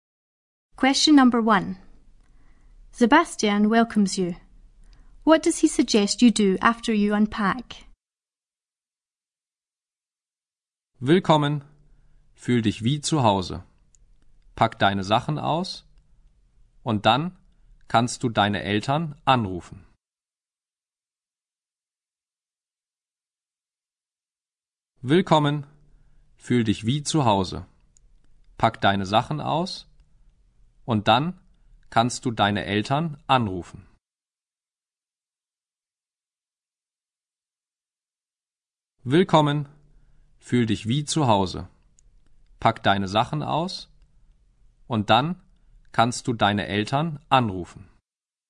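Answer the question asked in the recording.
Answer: Phone your parents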